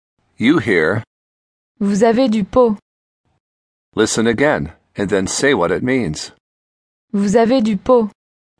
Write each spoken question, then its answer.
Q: Listen again, and then say what it means.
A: You are lucky.